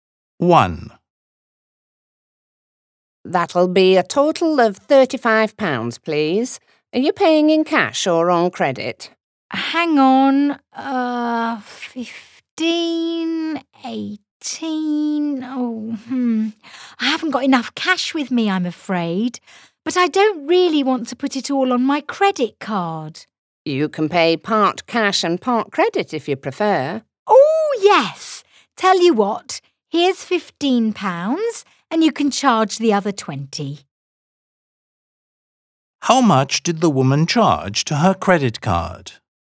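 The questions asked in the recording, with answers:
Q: How much did the woman charge to her credit card?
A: £20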